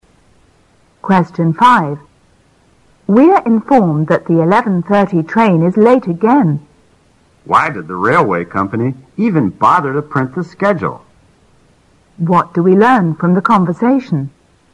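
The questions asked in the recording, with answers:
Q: What do we learn from the conversation?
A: The 11:30 train is often late and doesn't keep to the schedule.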